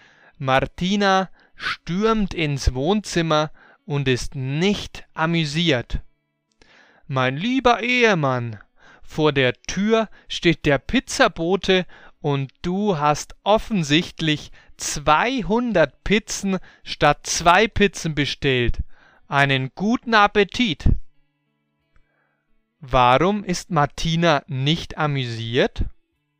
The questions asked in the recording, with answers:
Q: Warum ist Martina nicht amüsiert?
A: Weil Alejandro zu viele Pizzen bestellt hat.